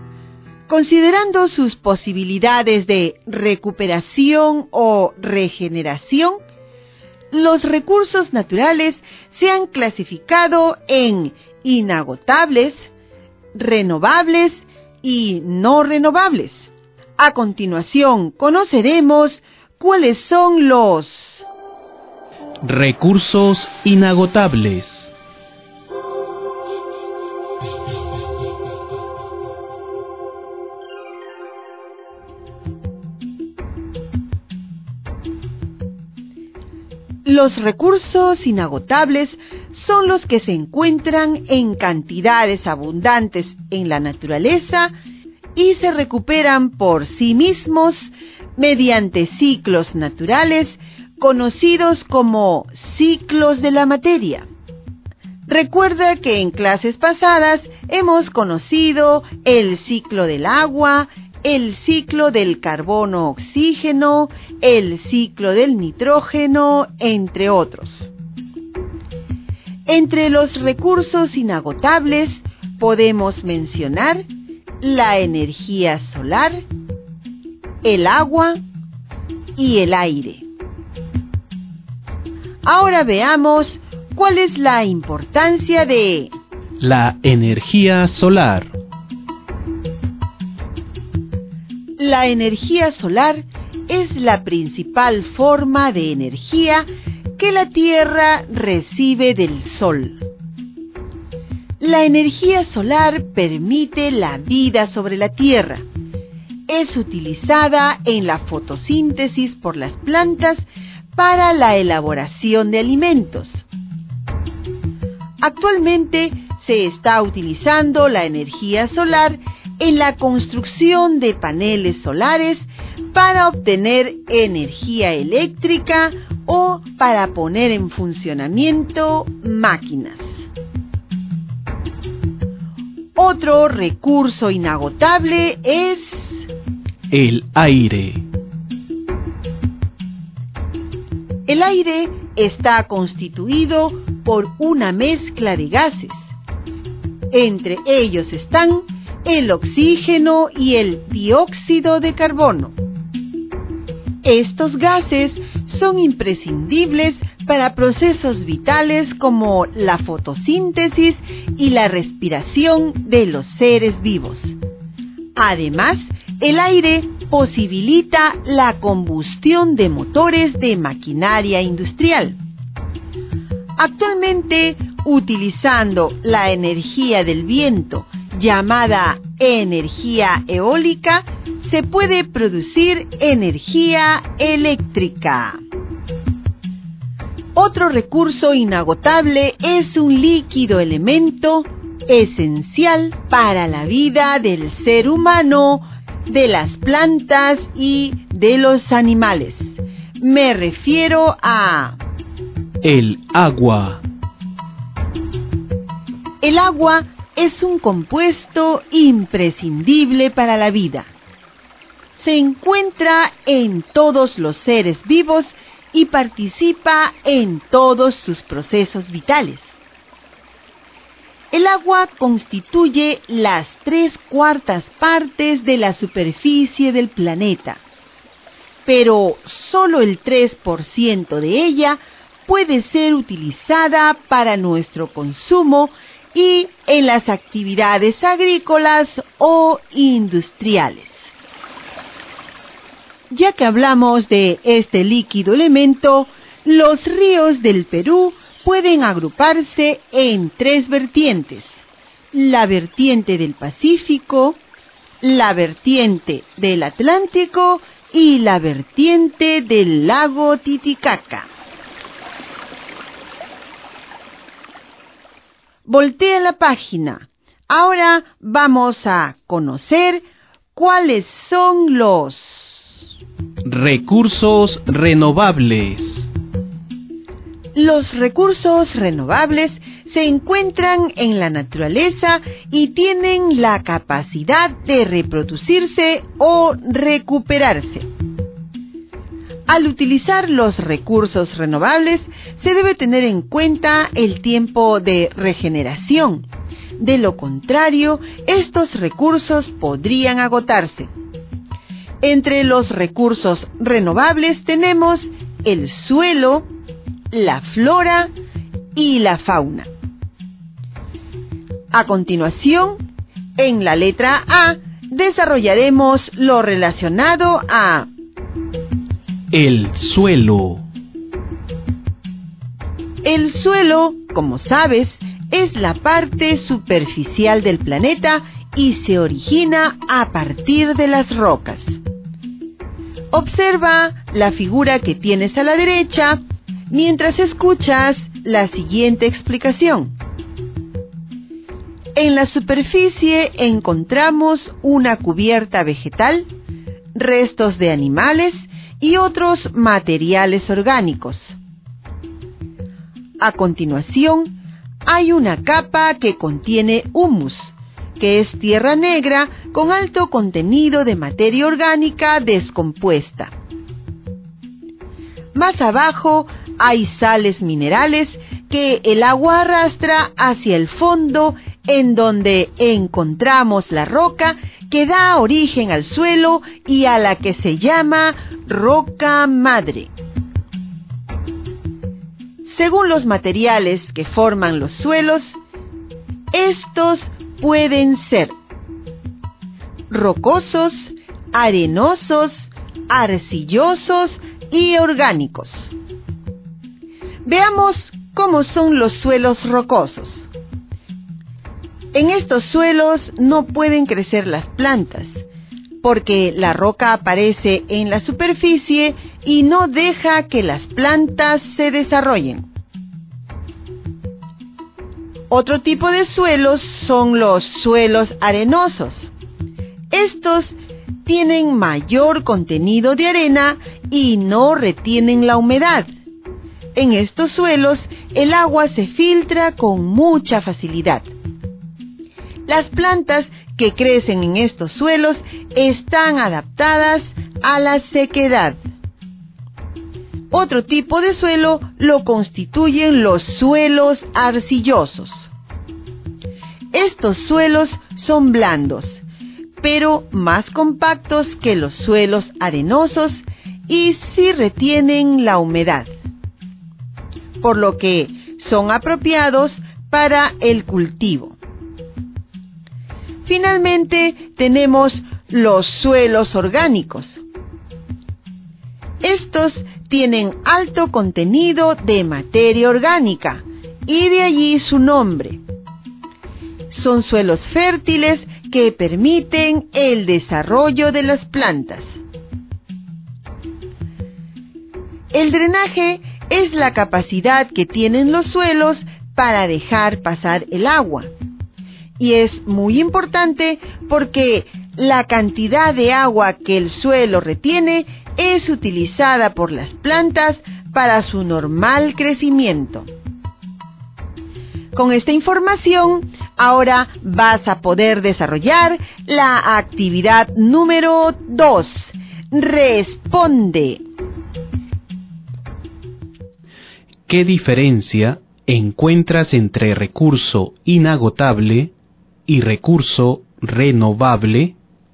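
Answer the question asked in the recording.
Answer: Los inagotables son abundantes y se recuperan solos por ciclos naturales; los renovables pueden reproducirse o recuperarse, pero se agotan si no se respeta su tiempo de regeneración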